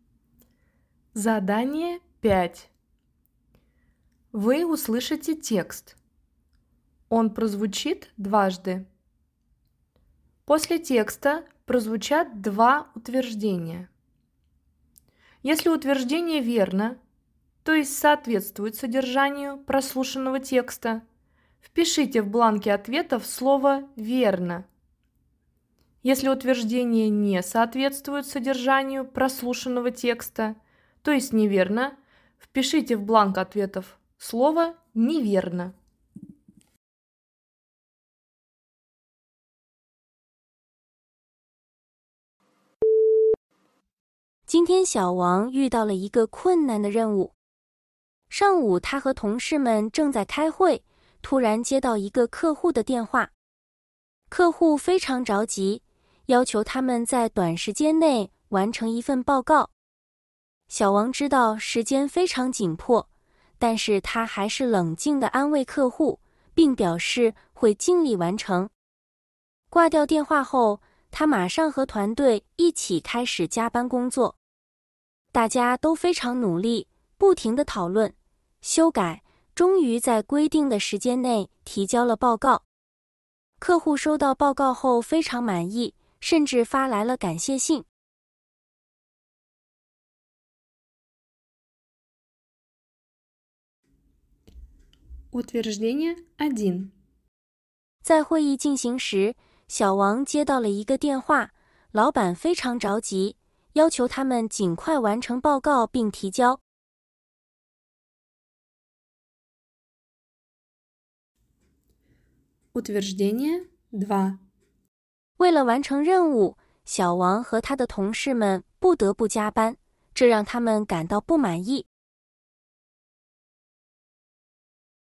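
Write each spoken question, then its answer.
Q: 在会议进行时,小王接到了一个电话,老板非常着急,要求他们尽快完成报告并提交。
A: 不对(打电话的是客户,不是老板)

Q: 为了完成任务,小王和他的同事们不得不加班,这让他们感到不满意。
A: 不对(没说他们不满意)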